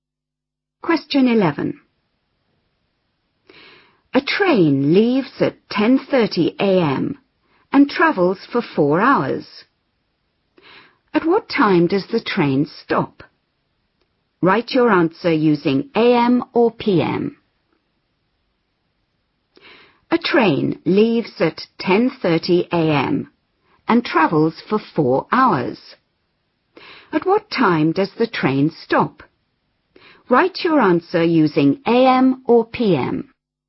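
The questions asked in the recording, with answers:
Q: At what time does the train stop?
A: 2:30 p.m.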